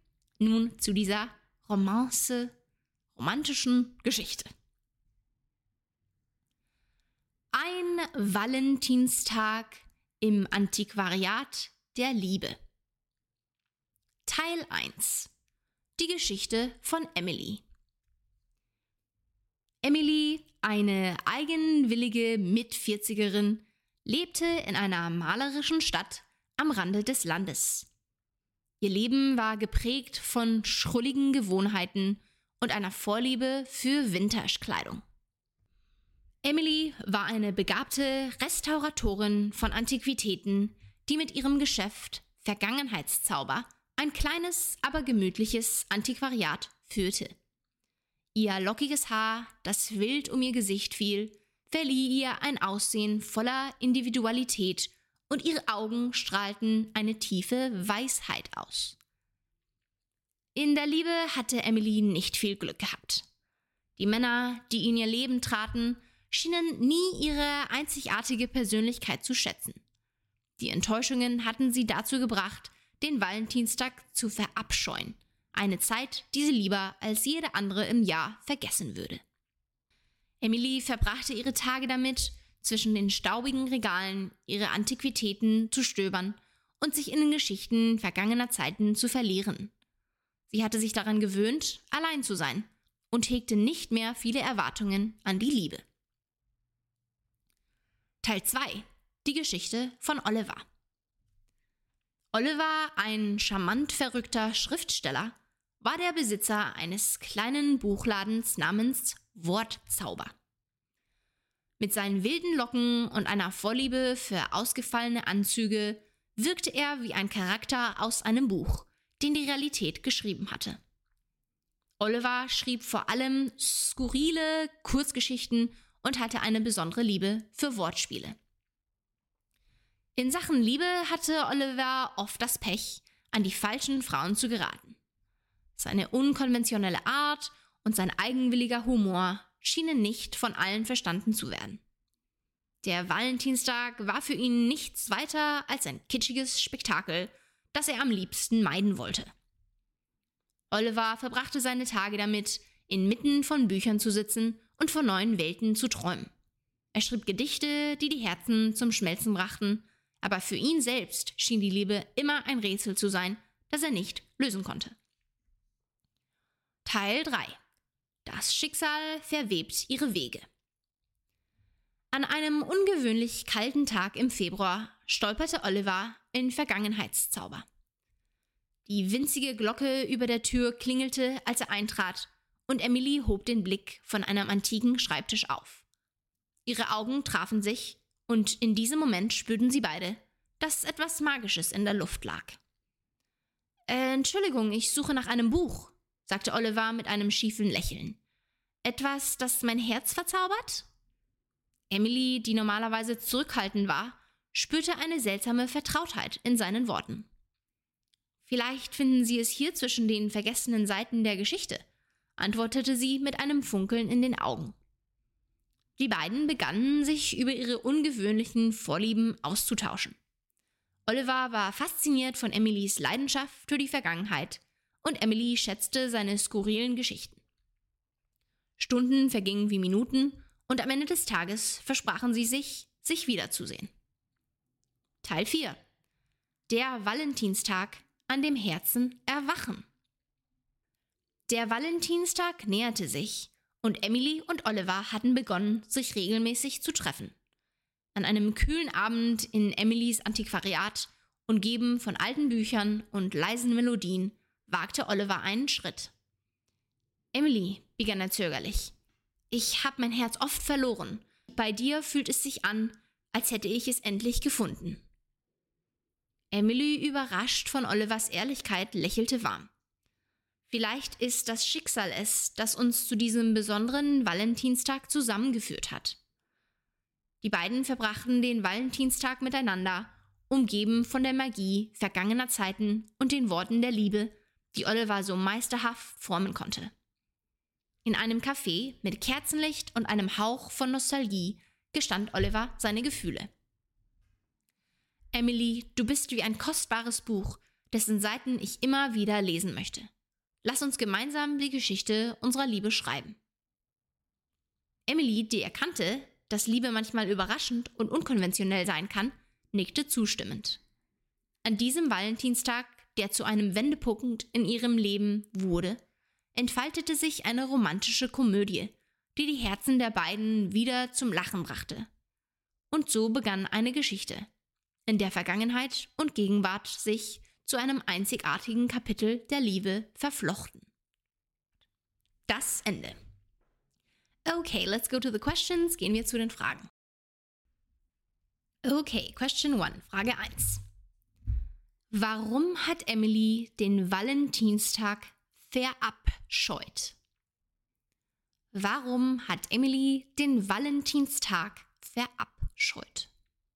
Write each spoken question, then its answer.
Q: Warum hat Emily den Valentinstag verabscheut?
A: Emily hat den Valentinstag aufgrund zahlreicher Enttäuschungen in der Liebe und dem Mangel an Wertschätzung für ihre einzigartige Persönlichkeit verabscheut.